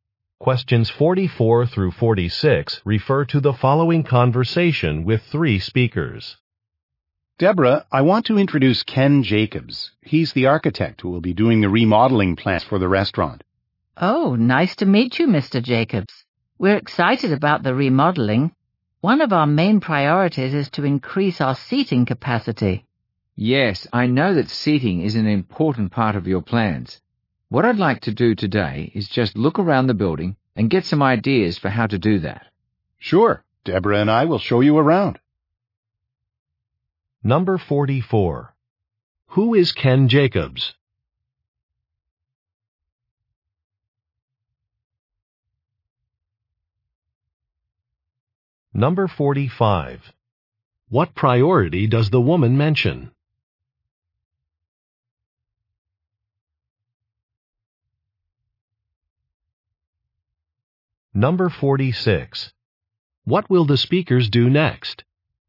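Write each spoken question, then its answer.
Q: Who is Ken Jacobs?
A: An architect

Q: What priority does the woman mention?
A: Increasing seating capacity

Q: What will the speakers do next?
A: Look around the building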